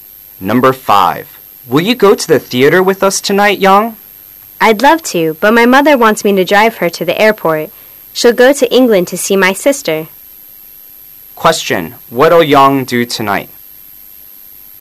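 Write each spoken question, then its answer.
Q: what'll Yang do tonight?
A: Drive her mother to the airport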